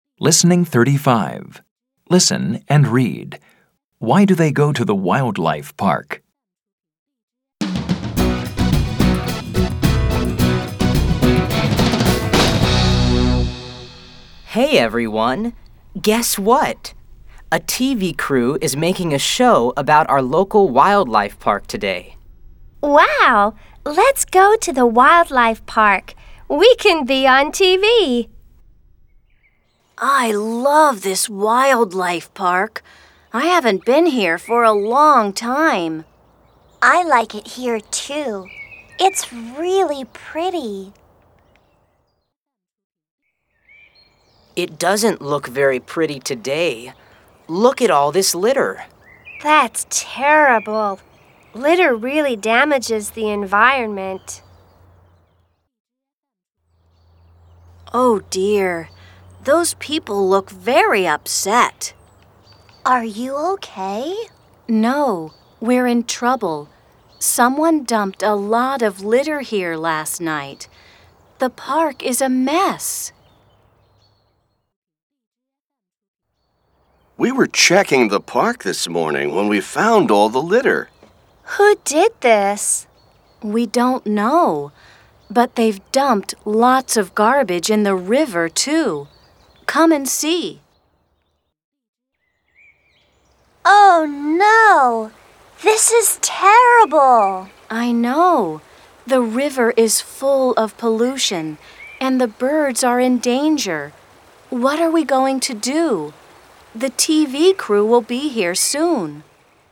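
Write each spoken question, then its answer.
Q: Why do they go to the wildlife park?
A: Because a TV crew is making a show about the park and they want to be on TV.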